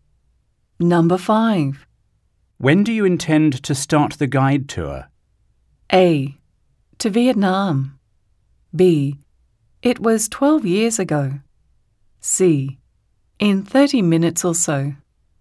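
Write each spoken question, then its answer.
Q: When do you intend to start the guide tour?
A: C: In 30 minutes or so.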